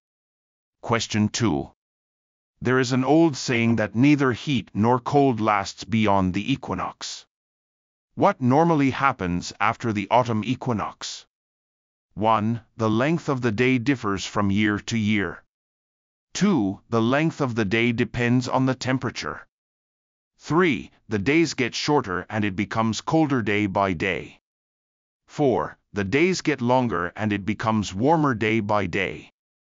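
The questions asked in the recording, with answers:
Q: What normally happens after the autumn equinox?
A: 3: The days get shorter and it becomes colder day by day.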